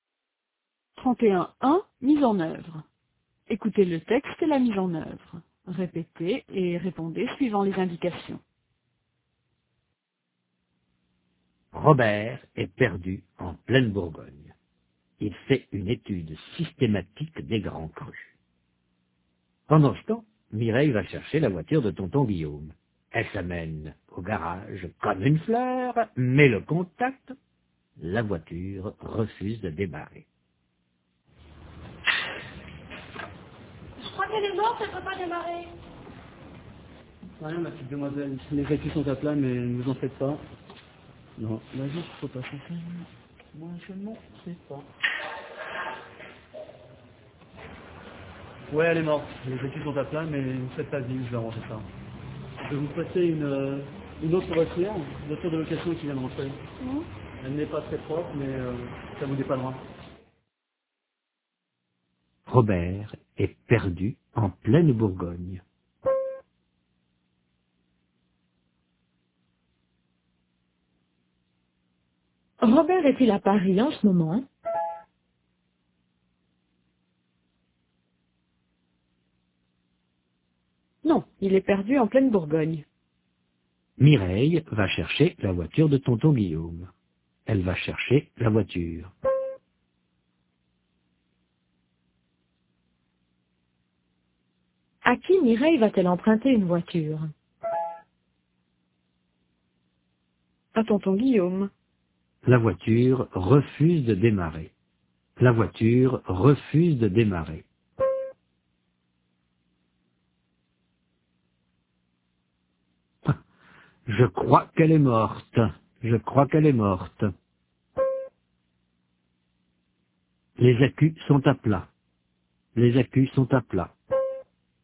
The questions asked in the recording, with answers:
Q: Robert est-il à Paris en ce moment?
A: Non, il est perdu en pleine Bourgogne.

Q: À qui Mireille va-t-elle emprunter une voiture?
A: À tonton Guillaume.